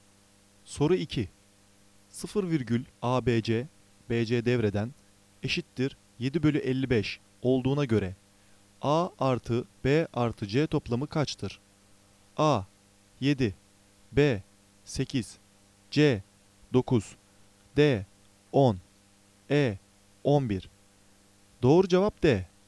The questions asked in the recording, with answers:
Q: 0 virgül ABC BC devreden eşittir 7 bölü 55 olduğuna göre A artı B artı C toplamı kaçtır?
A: Doğru cevap D.